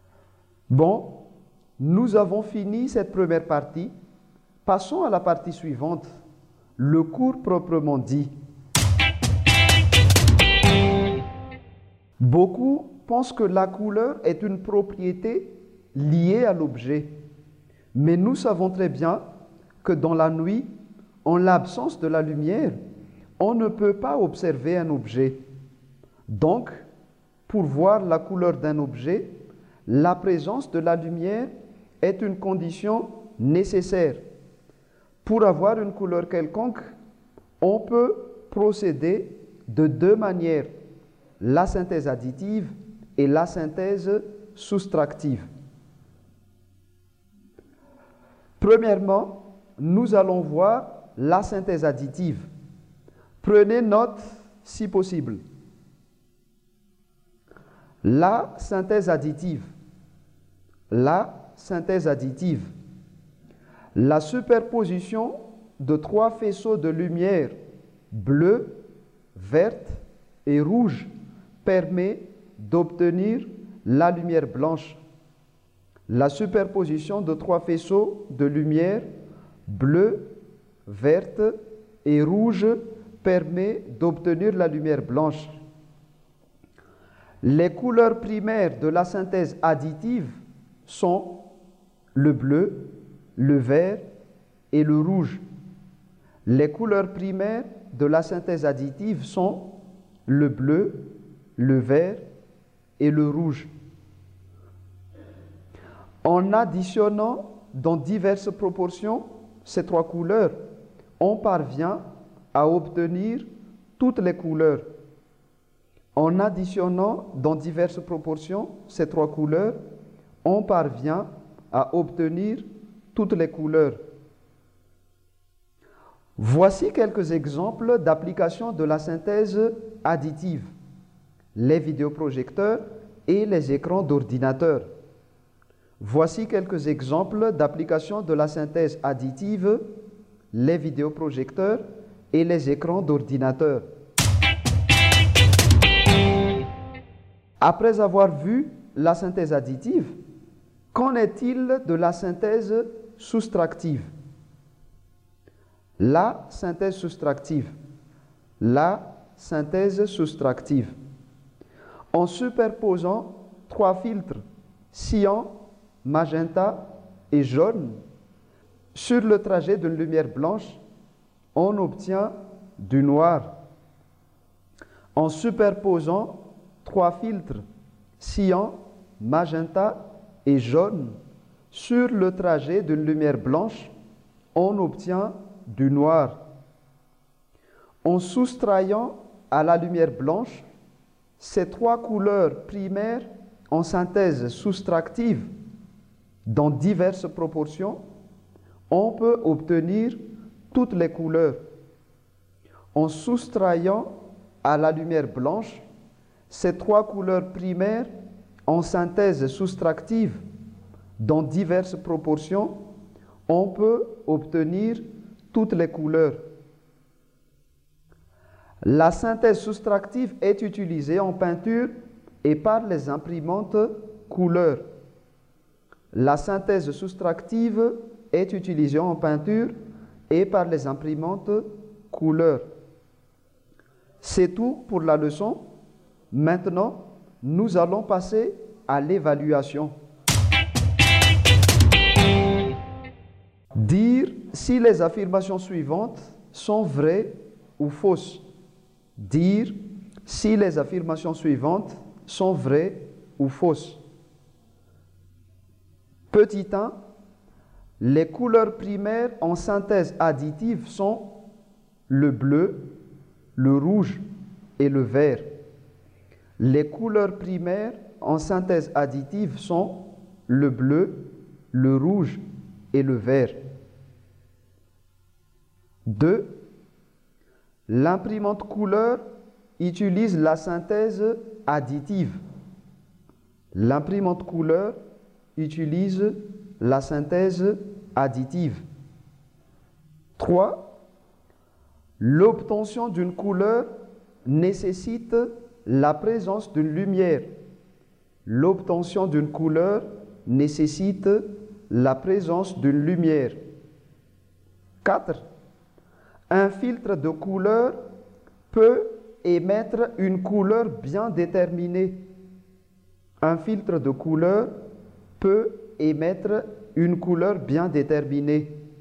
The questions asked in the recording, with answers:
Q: Petit 1, les couleurs primaires en synthèse additive sont le bleu, le rouge et le vert.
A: 1. Les couleurs primaires en synthèse additive sont le bleu, le rouge et le vert, vrai.

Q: 2. L'imprimante couleur utilise la synthèse additive.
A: 2. L'imprimante couleur utilise la synthèse additive fausse.

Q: 3. L'obtention d'une couleur nécessite la présence d'une lumière.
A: 3. L'obtention d'une couleur nécessite la présence d'une lumière vraie.